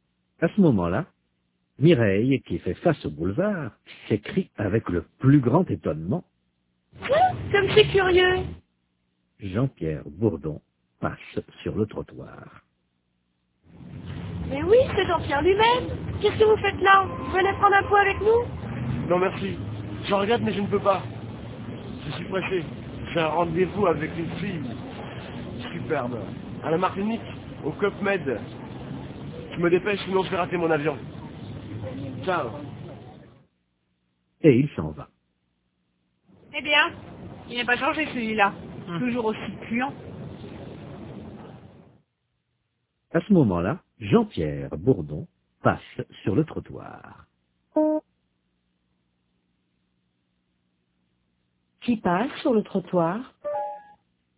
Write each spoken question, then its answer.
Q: Qui passe sur le trottoir?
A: Jean-Pierre Bourdon.